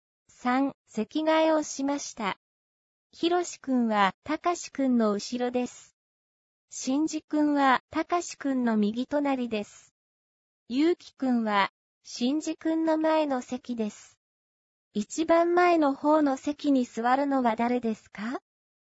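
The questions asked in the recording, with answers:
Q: 一番前の方の席に座るのは誰ですか?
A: ゆうきくん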